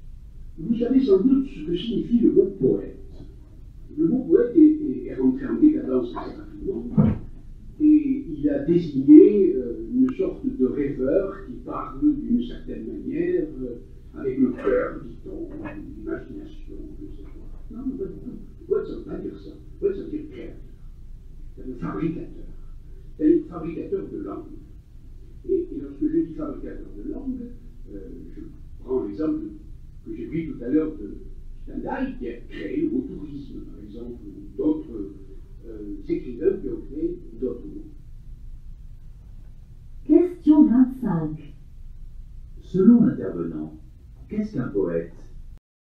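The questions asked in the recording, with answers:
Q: Selon l'intervenant, qu'est-ce qu'un poète ?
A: Un créateur, un fabricateur de langue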